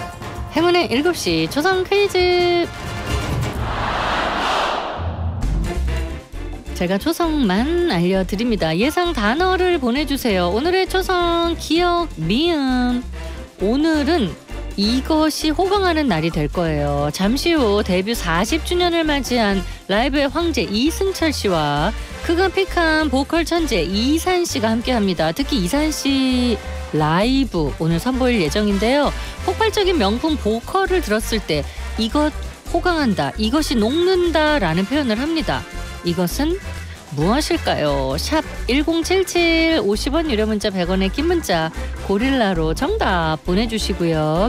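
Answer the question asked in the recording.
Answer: 고막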